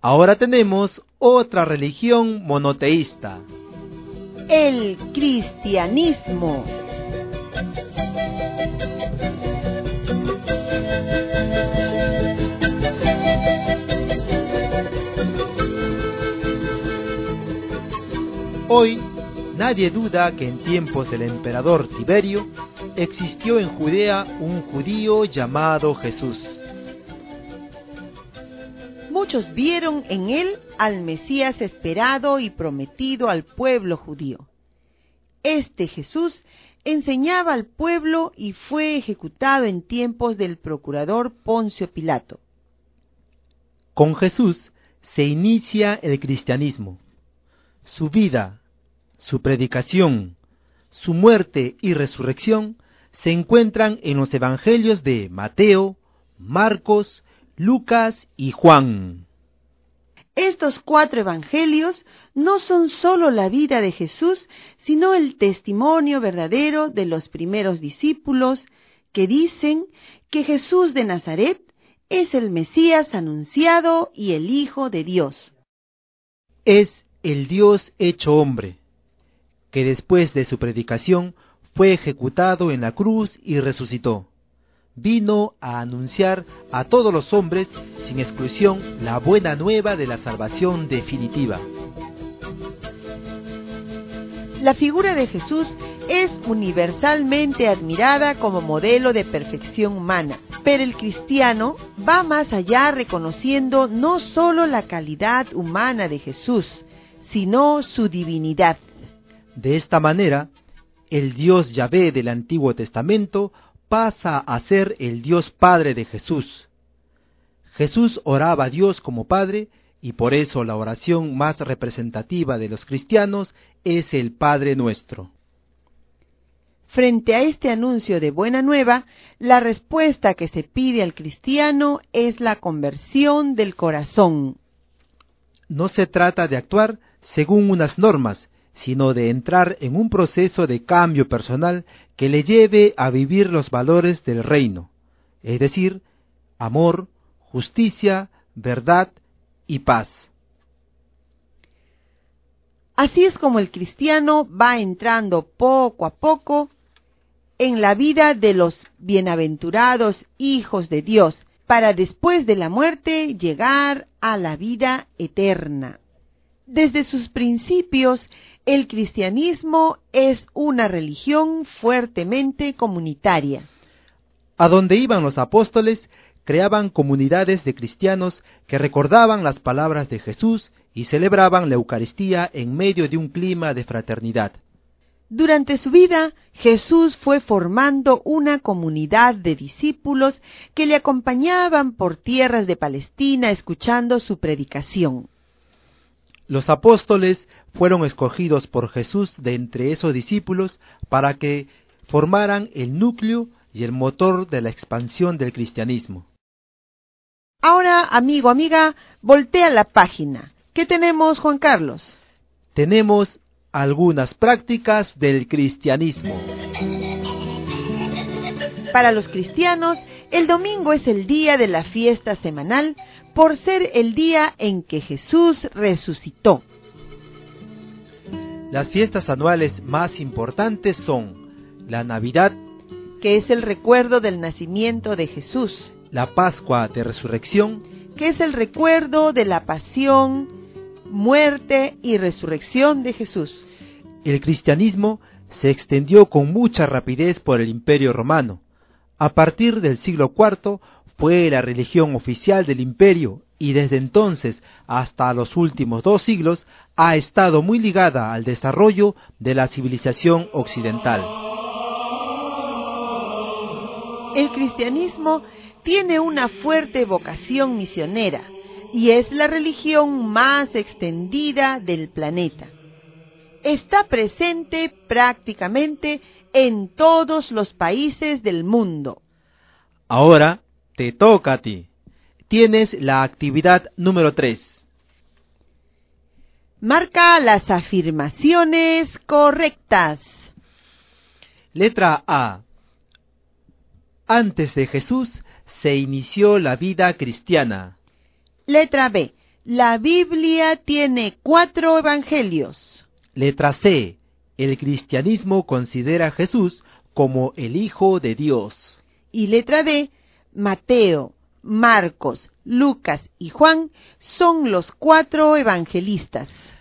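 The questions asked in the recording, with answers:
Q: Letra A. Antes de Jesús se inició la vida cristiana.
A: Incorrecta

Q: Letra B. La Biblia tiene 4 evangelios.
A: Correcta

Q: Letra C. El cristianismo considera a Jesús como el Hijo de Dios.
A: Correcta

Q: Y letra D. Mateo, Marcos, Lucas y Juan son los 4 evangelistas.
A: Correcta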